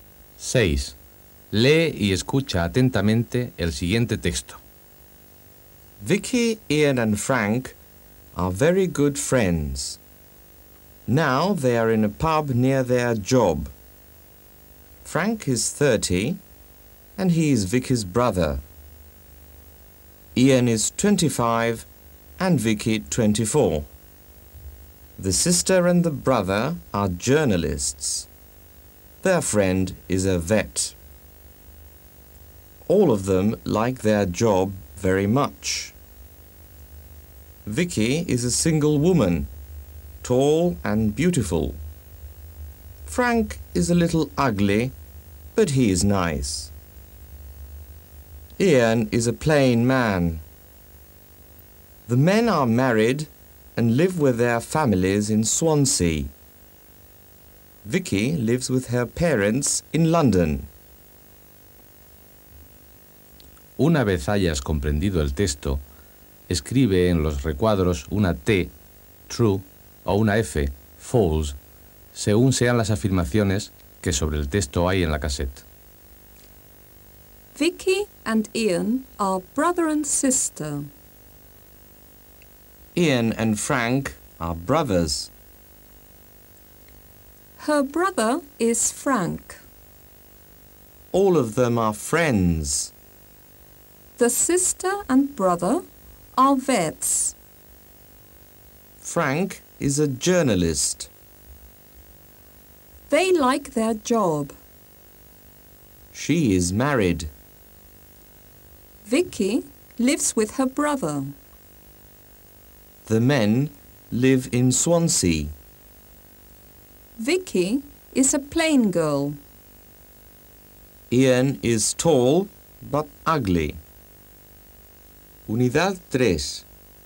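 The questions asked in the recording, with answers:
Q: Vicky and Ian are brother and sister.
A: False

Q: Ian and Frank are brothers.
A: False

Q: Her brother is Frank.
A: True

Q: All of them are friends.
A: True

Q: The sister and brother are vets.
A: False

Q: Frank is a journalist.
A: True

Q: They like their job.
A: True

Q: She is married.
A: False

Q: Vicky lives with her brother.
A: False

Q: The men live in Swansea.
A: True

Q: Vicky is a plain girl.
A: False

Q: Ian is tall but ugly.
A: False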